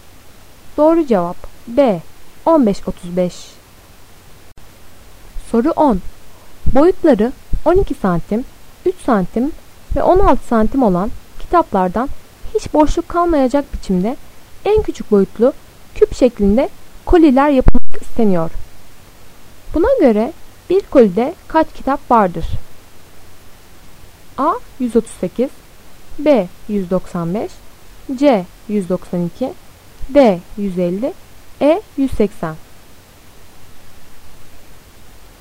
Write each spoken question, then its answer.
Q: Buna göre bir kolide kaç kitap vardır?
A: Doğru cevap C. 192.